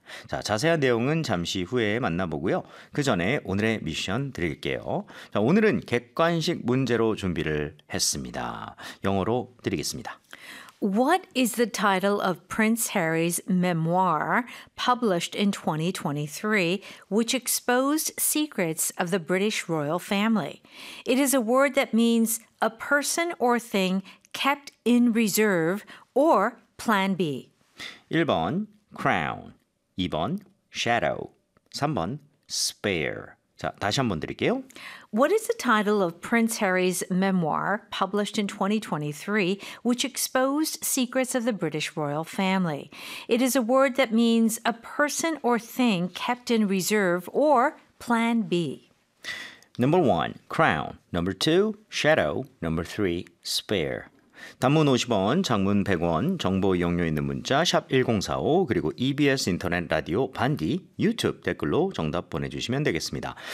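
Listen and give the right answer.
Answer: 3: spare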